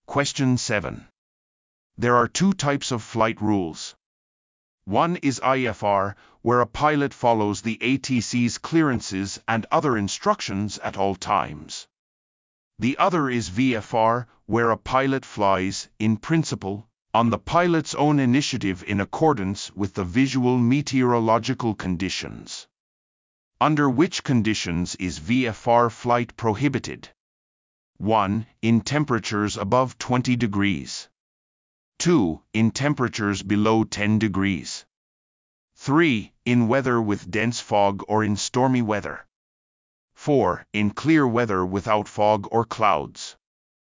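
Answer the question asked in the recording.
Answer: 3: In weather with dense fog or in stormy weather.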